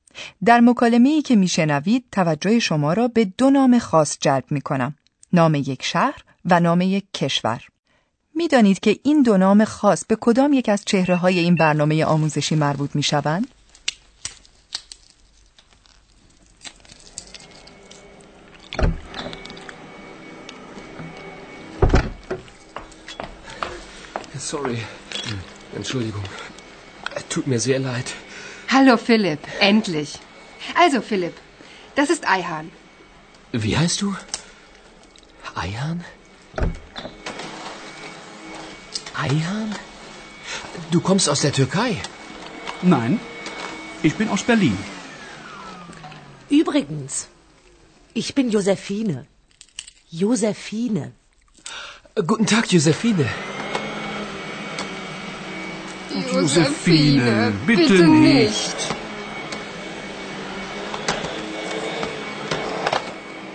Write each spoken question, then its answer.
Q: میدانید که این دو نام خاص به کدام یک از چهره های این برنامه آموزشی مربوط می شوند؟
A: همانگونه که متوجه شدید در گفتگوی آنها از برلین و ترکیه سخن می رود.